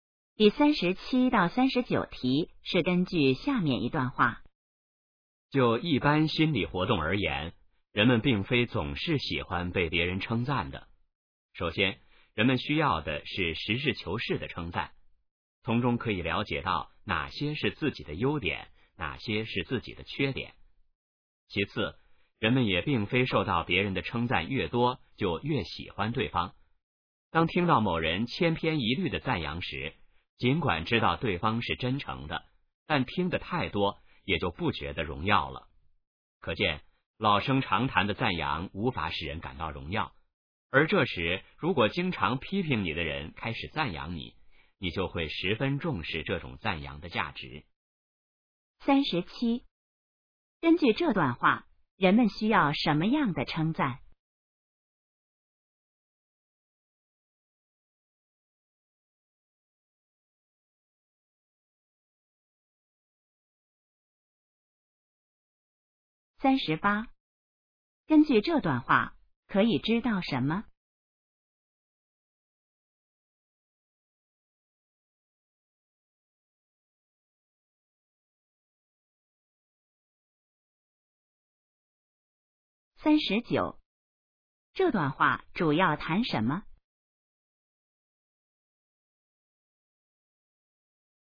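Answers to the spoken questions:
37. 实事求是的称赞
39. 人们对称赞的心理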